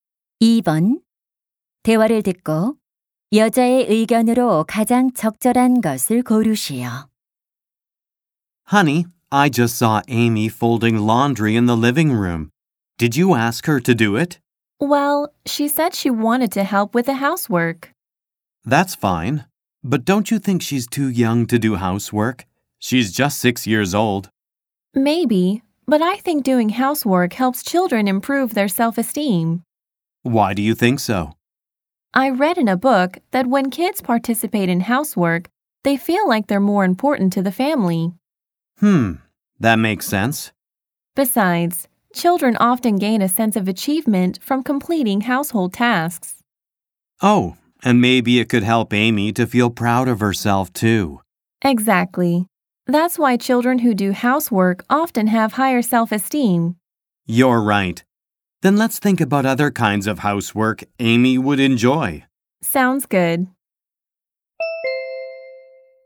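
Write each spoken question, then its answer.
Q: 대화를 듣고 여자의 의견으로 가장 적절한 것을 고르시오.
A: 집안일을 하는 것은 아이들의 자존감 향상에 도움이 된다.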